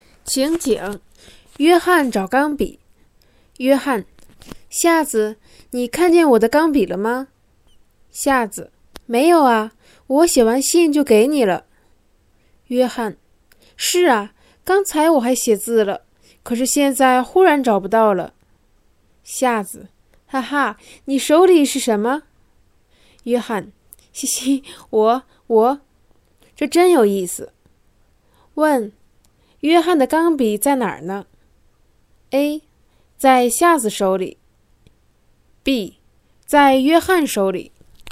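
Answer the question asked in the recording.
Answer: B: 在约翰手里。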